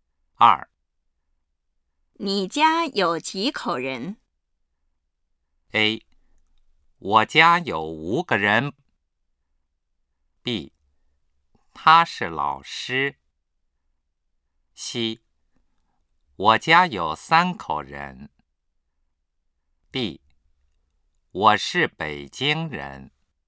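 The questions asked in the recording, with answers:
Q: 你家有几口人?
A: C: 我家有三口人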